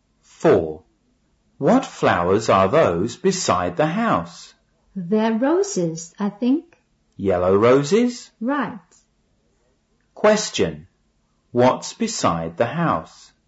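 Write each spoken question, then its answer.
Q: Question. What's beside the house?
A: Yellow roses.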